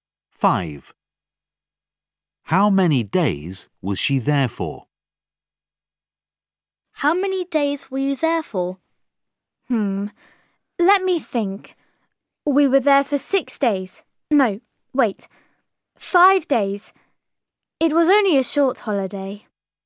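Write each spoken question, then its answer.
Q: How many days was she there for?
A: 5 days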